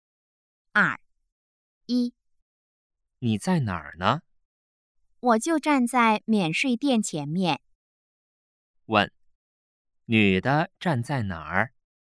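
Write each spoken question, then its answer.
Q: 问,女的站在哪儿?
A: 免税店前面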